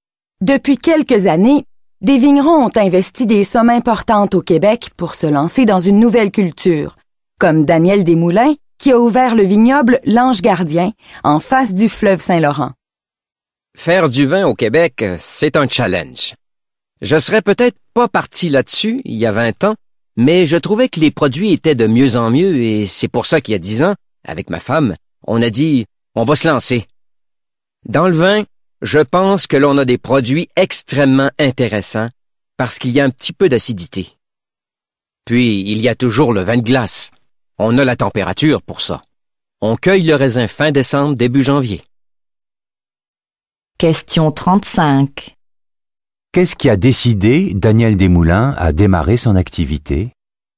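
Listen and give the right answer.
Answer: L'amélioration de la qualité des vins québécois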